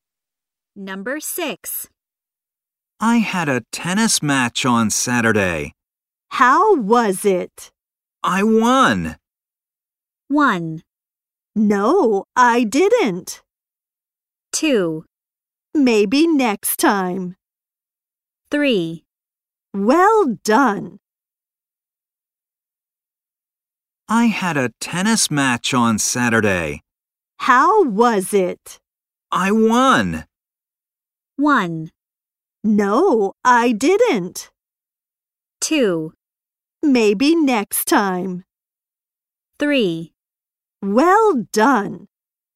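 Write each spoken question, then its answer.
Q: I won.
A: 3: Well done.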